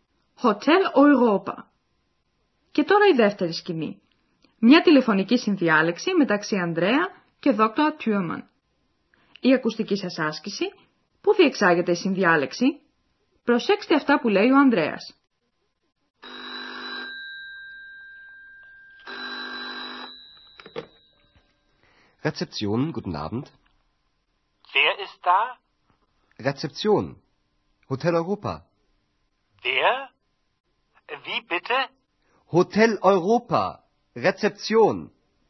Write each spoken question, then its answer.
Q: Πού διεξάγεται η συνδιάλεξη?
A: Στη reception, Rezeption, σηκώνει το τηλέφωνο ο Ανδρέας.